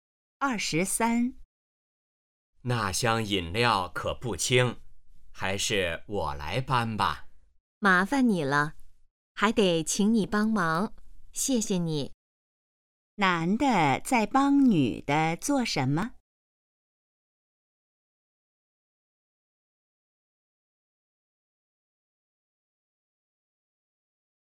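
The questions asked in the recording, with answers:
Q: 男的在帮女的做什么?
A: 搬饮料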